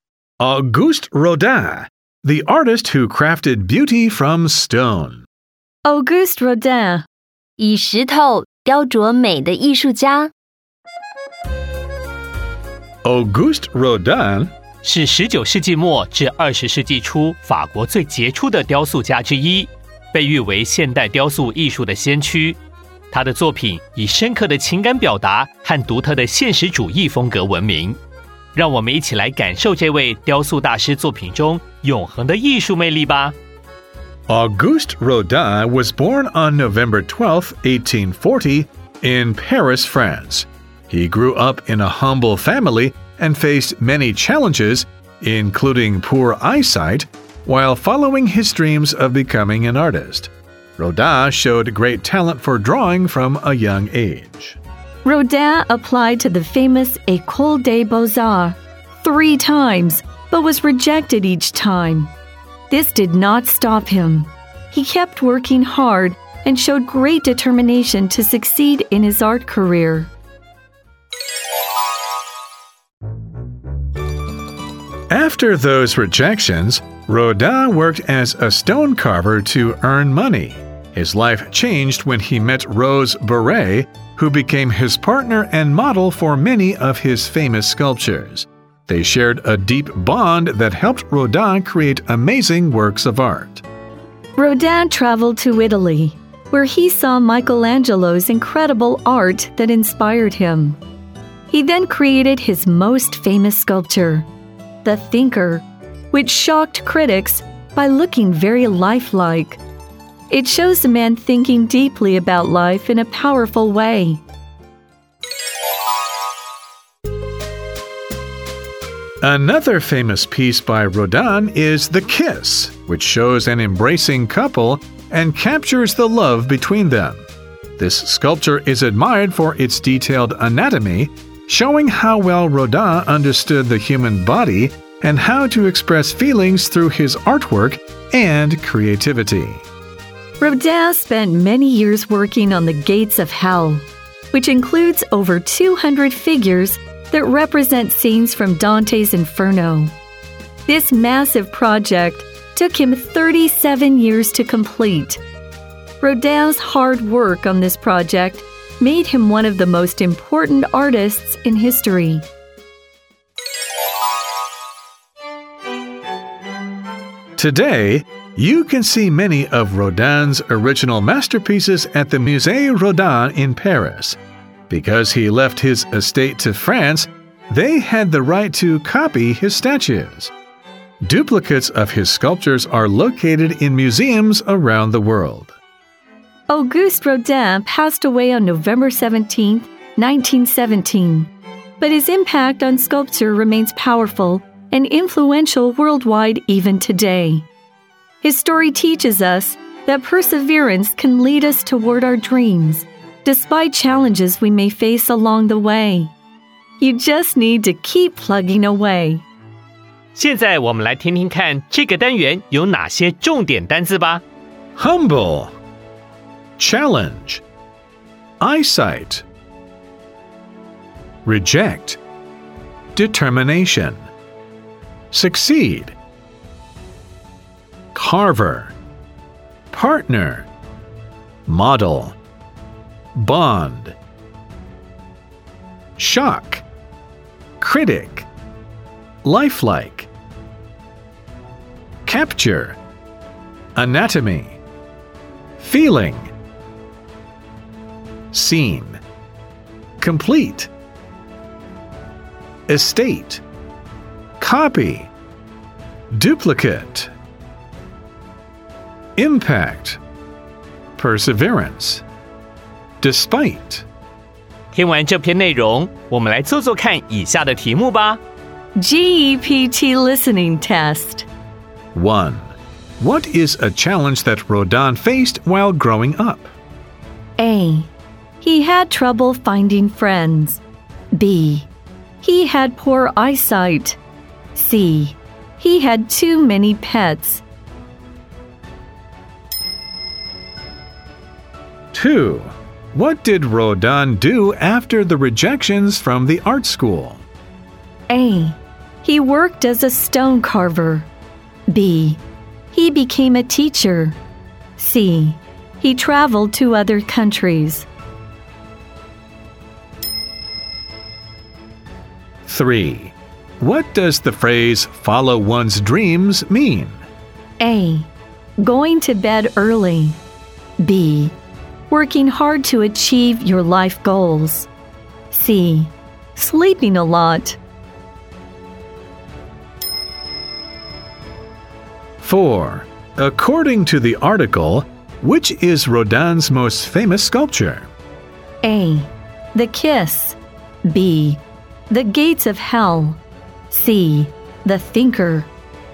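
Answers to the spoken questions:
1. B: He had poor eyesight.
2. A: He worked as a stone carver.
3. B: Working hard to achieve your life goals.
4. C: The Thinker.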